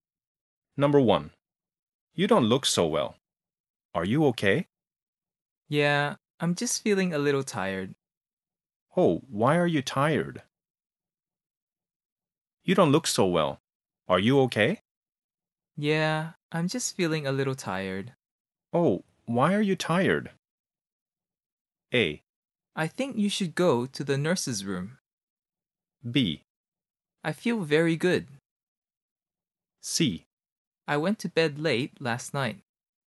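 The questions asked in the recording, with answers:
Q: Oh, why are you tired?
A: C: I went to bed late last night.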